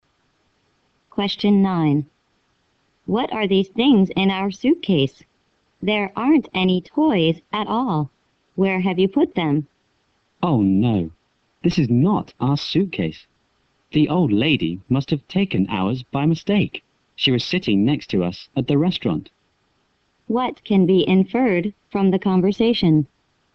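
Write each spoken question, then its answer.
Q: What can be inferred from the conversation?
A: They have the wrong suitcase; the old lady took theirs by mistake.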